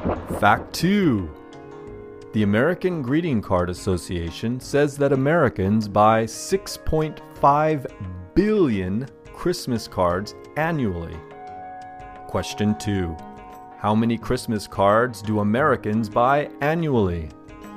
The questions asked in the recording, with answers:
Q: How many Christmas cards do Americans buy annually?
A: Americans buy 6.5 billion Christmas cards annually.